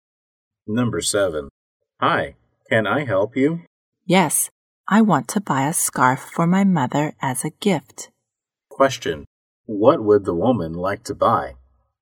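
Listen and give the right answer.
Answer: A scarf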